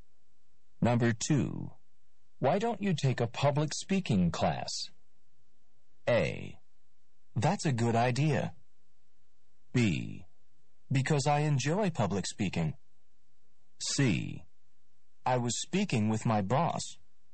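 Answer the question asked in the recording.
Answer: A: That's a good idea.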